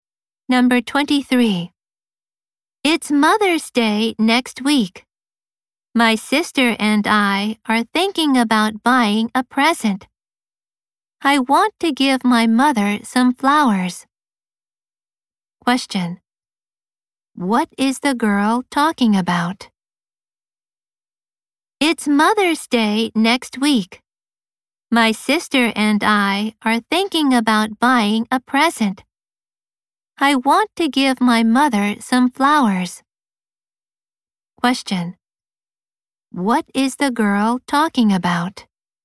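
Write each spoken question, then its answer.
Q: What is the girl talking about?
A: A present for her mother for Mother's Day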